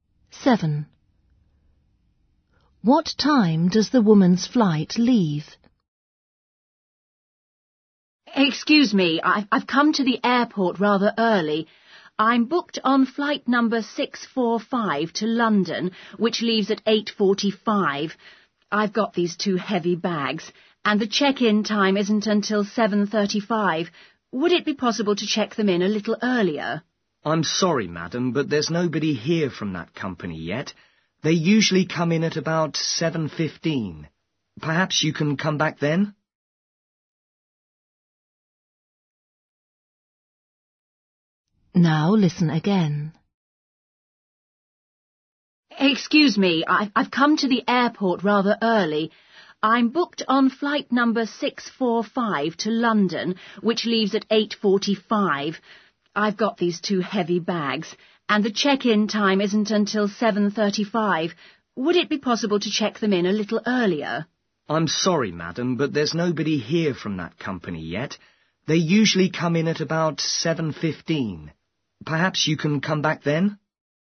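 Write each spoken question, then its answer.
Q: What time does the woman's flight leave?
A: 8:45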